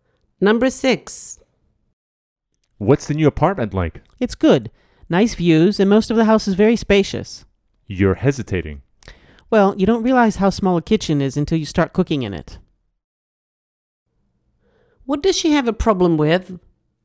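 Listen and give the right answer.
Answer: The small kitchen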